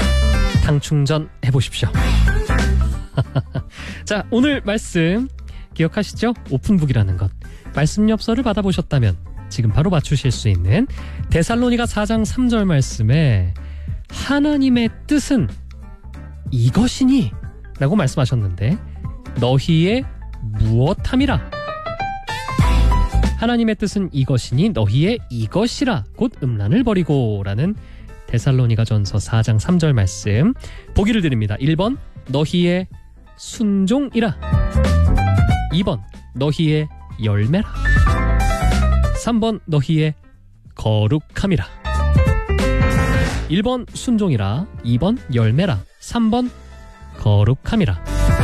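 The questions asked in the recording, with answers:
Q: 하나님의 뜻은 이것이니 너희의 이것이라 곧 음란을 버리고 라는 데살로니가 전서 4장 3절 말씀 보기를 드립니다.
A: 3: 너희의 거룩함이라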